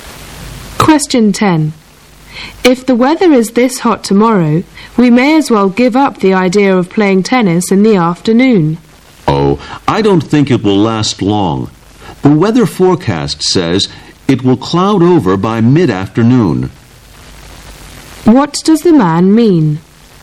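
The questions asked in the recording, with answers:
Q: What does the man mean?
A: The hot weather won't last, so they can still play tennis.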